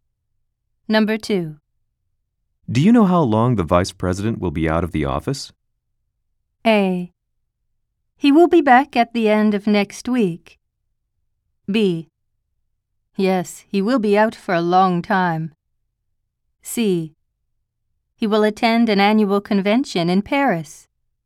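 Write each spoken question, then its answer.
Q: Do you know how long the vice president will be out of the office?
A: A: He will be back at the end of next week.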